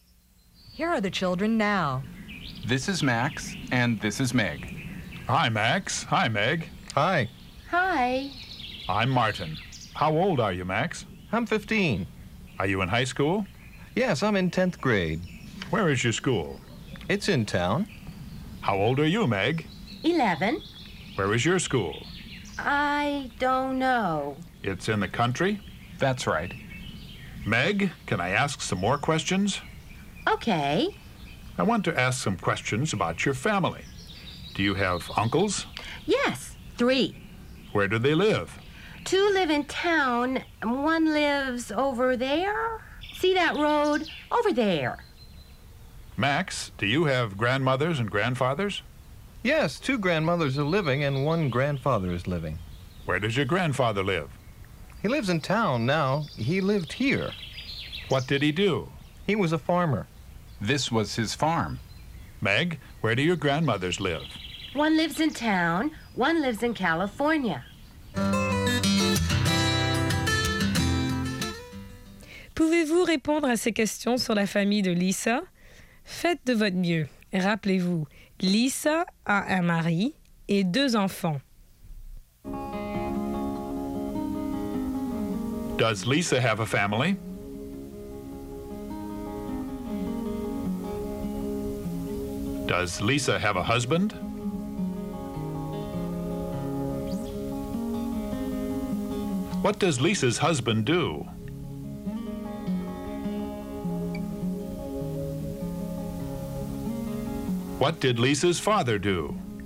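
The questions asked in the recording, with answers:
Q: Does Lisa have a family?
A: Yes, she does.

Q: Does Lisa have a husband?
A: Yes, she does.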